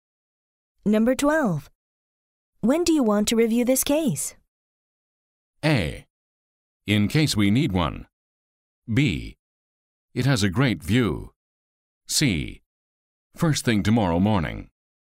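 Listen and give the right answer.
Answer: C: First thing tomorrow morning.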